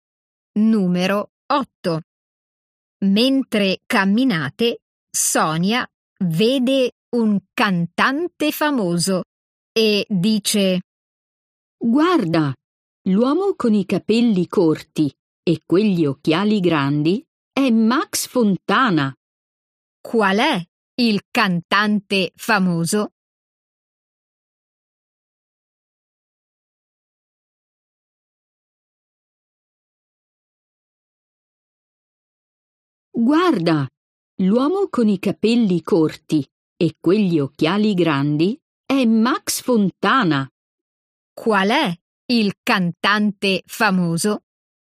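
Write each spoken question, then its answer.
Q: Qual è il cantante famoso?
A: l'uomo con i capelli corti e gli occhiali grandi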